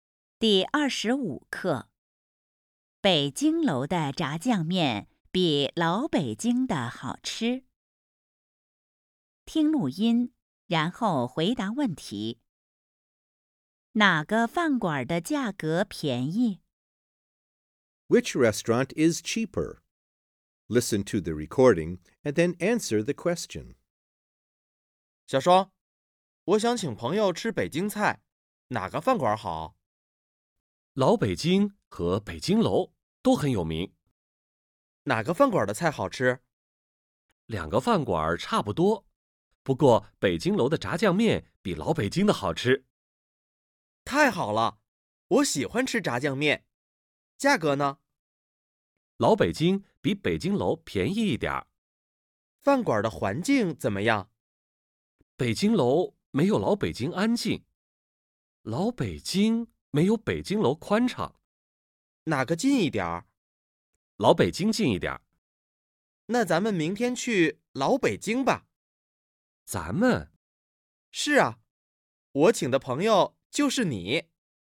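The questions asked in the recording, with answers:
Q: 哪个饭馆的价格便宜?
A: 老北京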